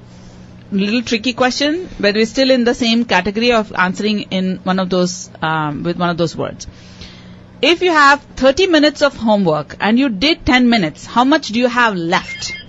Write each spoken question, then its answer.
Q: If you have 30 minutes of homework and you did 10 minutes, how much do you have left?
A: You'll have two-thirds.